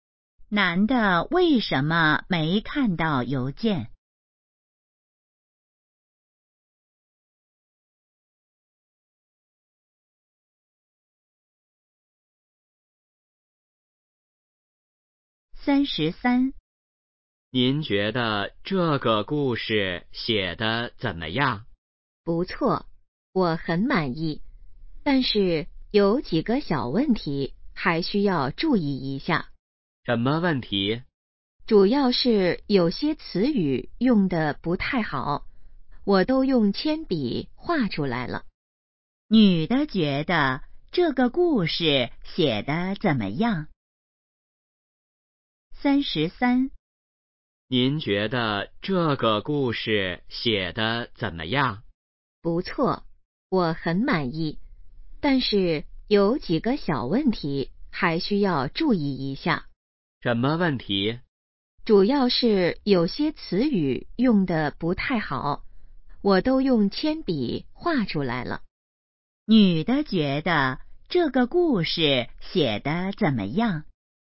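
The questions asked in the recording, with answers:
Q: 女的觉得这个故事写得怎么样?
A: 不错,很满意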